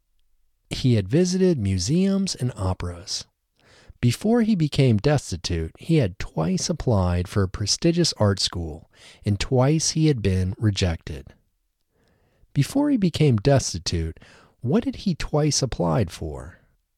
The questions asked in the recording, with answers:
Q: Before he became destitute, what had he twice applied for?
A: Before he became destitute, he had twice applied for a prestigious art school.